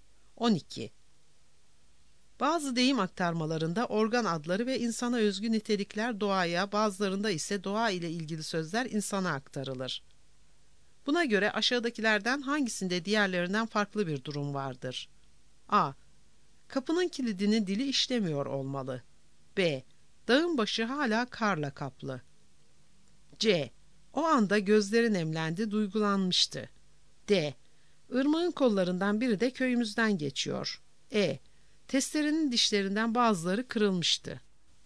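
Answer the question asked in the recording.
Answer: C: O anda gözleri nemlendi, duygulanmıştı.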